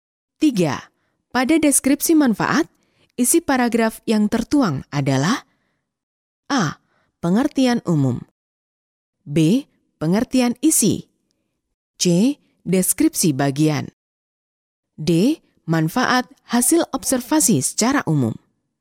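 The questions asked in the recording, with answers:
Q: Pada deskripsi manfaat, isi paragraf yang tertuang adalah A.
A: D: Manfaat hasil observasi secara umum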